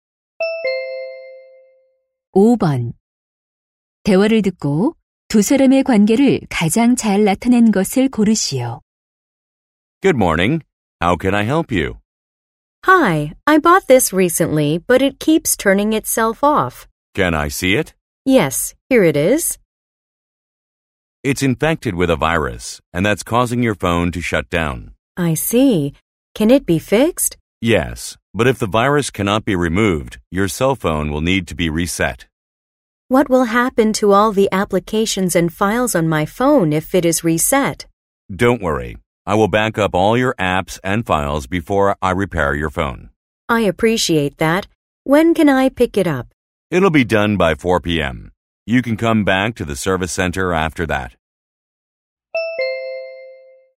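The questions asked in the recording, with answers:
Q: 대화를 듣고 두 사람의 관계를 가장 잘 나타낸 것을 고르시오.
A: 고객 - 휴대전화 수리 기사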